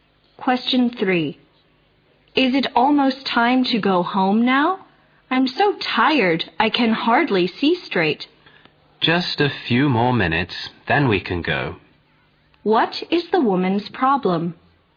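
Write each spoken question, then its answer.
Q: What is the woman's problem?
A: She is very tired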